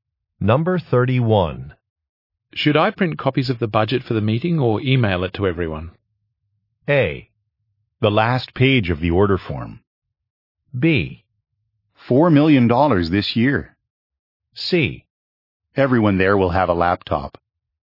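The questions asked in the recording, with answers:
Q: Should I print copies of the budget for the meeting or email it to everyone?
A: C: Everyone there will have a laptop.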